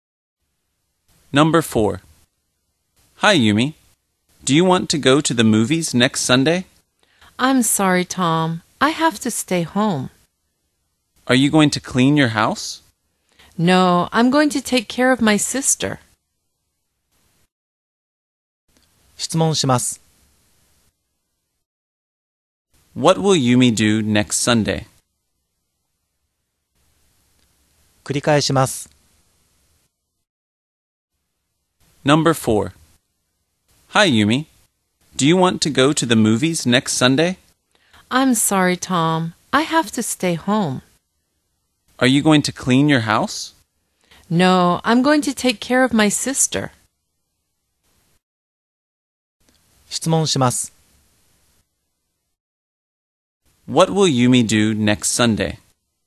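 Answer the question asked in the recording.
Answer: She will take care of her sister.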